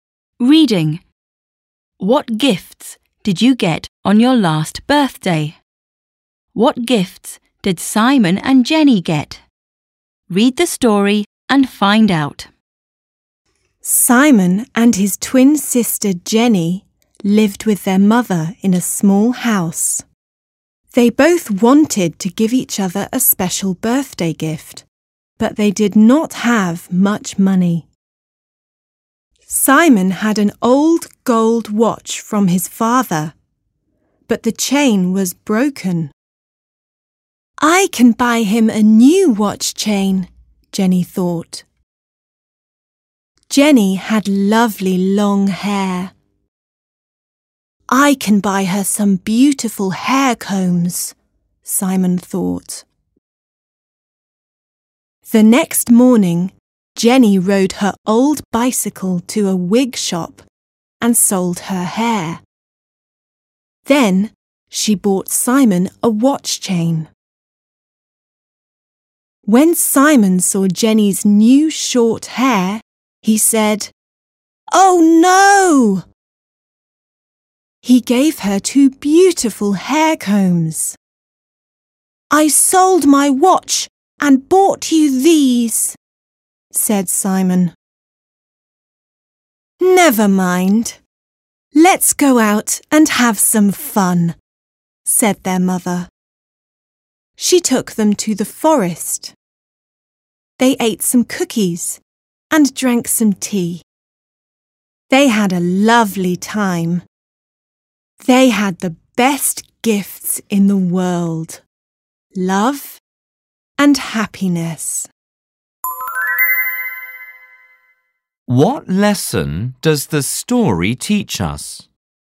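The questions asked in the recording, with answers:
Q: What gifts did Simon and Jenny get?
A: Simon got a watch chain and Jenny got two hair combs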